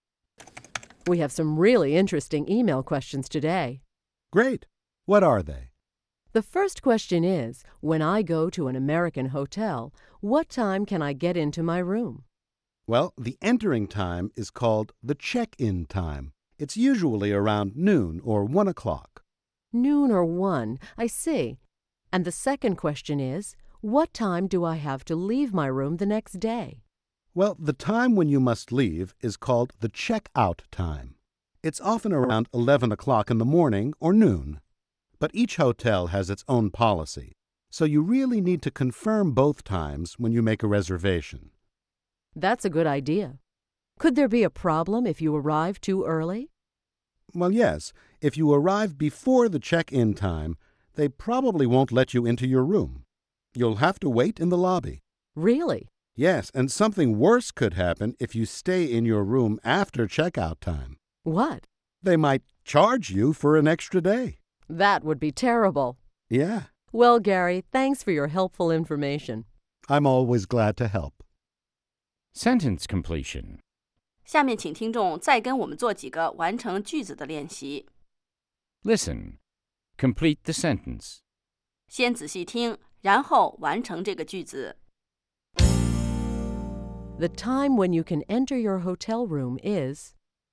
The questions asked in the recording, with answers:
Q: The time when you can enter your hotel room is...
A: The check-in time. The entering time is called the check-in time.